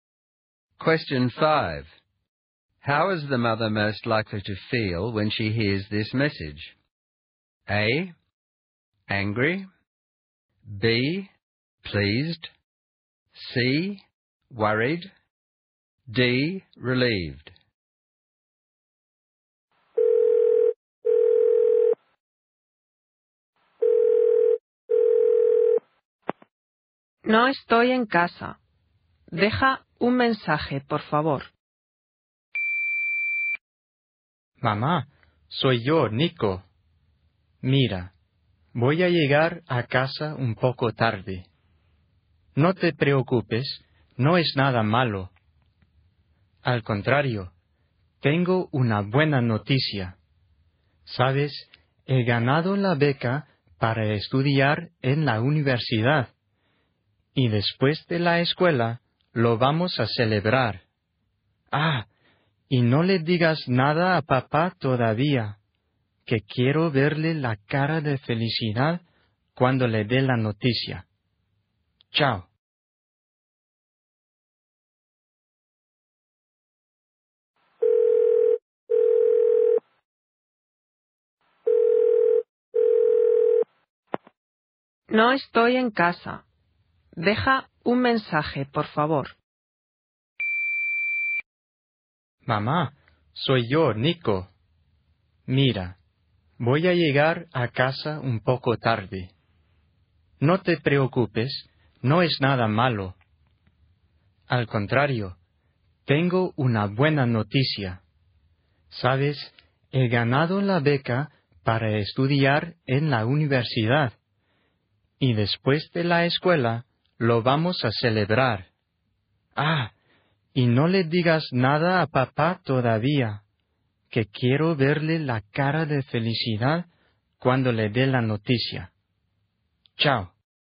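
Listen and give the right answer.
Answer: B: Pleased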